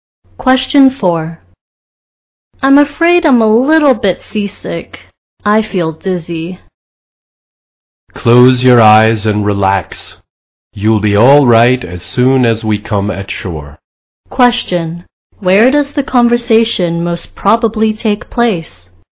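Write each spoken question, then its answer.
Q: Where does the conversation most probably take place?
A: On a boat.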